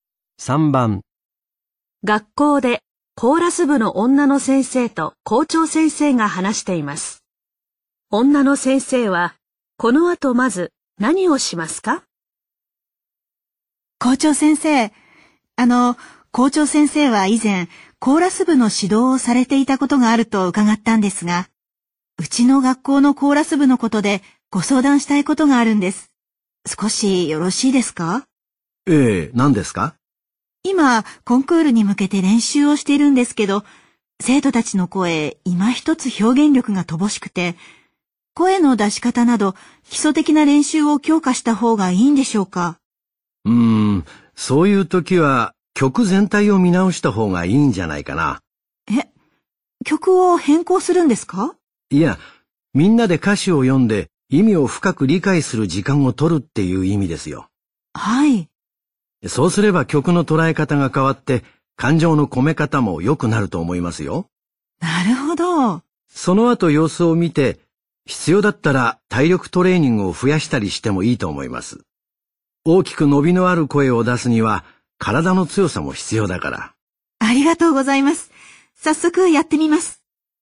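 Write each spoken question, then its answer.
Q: 女の先生は、この後まず何をしますか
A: 生徒たちと歌詞を読んで意味を理解する時間を取る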